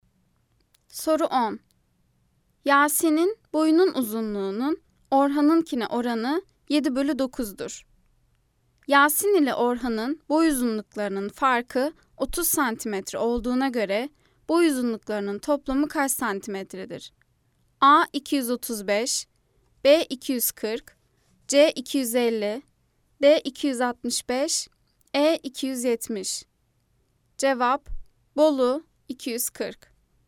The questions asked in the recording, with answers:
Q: Yasin ile Orhan'ın boy uzunluklarının farkı 30 cm olduğuna göre boy uzunluklarının toplamı kaç cm'dir?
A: Cevap: Bolu 240.